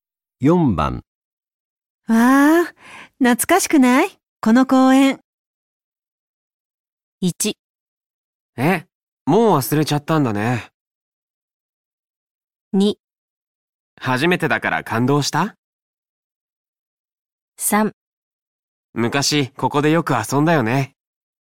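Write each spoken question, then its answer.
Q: わあ、懐かしくない?この公園。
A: 3: 昔ここでよく遊んだよね。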